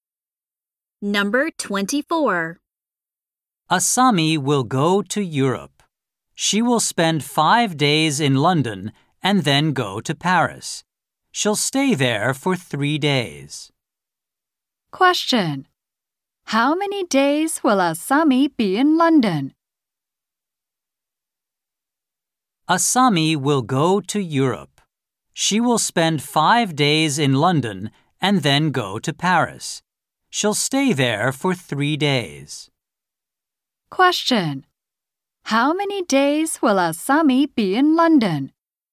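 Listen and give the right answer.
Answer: 5 days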